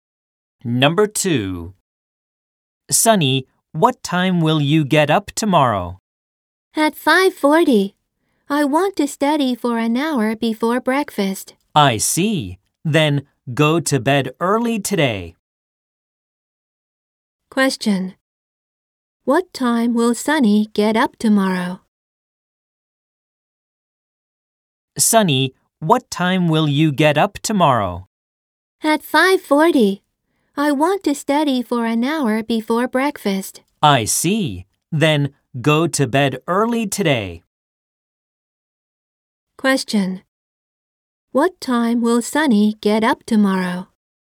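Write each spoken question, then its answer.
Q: What time will Sunny get up tomorrow?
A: At 5:40.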